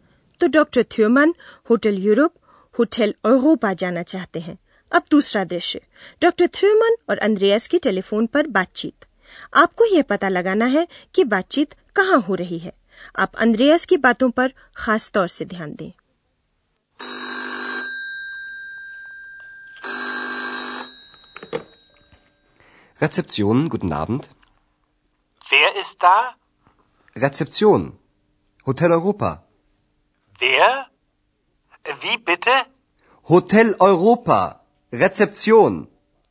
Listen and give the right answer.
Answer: Hotel Europa, तो आप जानते ही हैं और अंद्रयास reception पर है